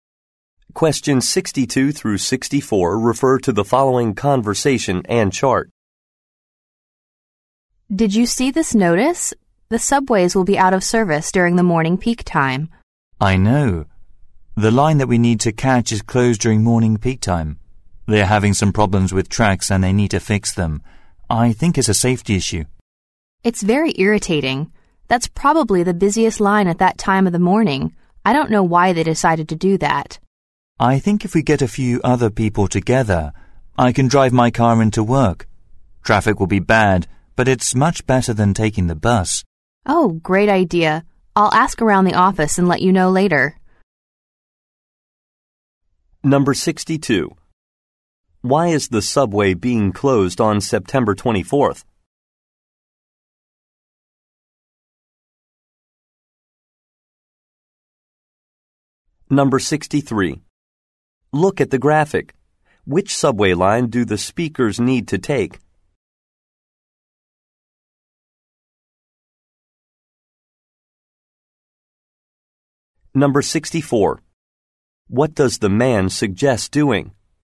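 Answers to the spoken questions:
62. To fix problems with the tracks
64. Carpooling to work in his car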